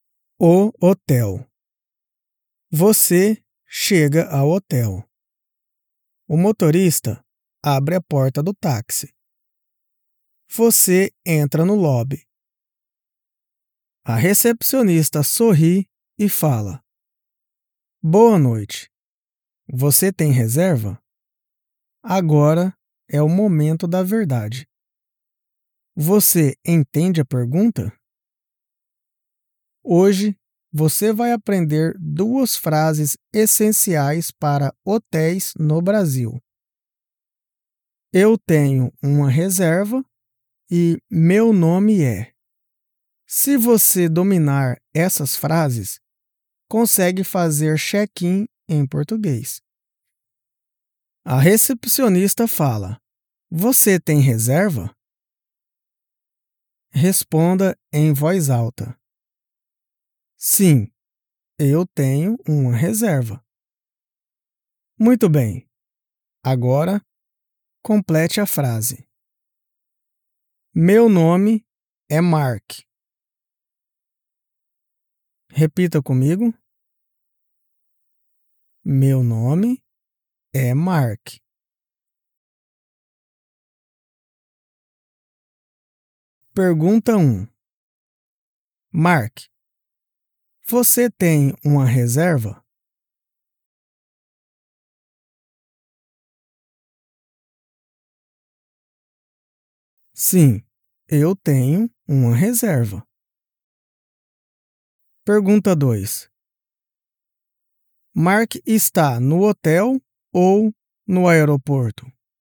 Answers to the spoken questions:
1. Sim, eu tenho uma reserva.
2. Ele está no hotel.